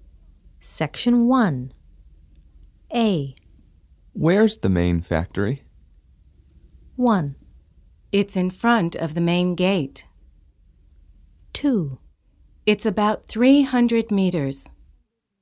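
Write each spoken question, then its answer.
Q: Where's the main factory?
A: 1: It's in front of the main gate.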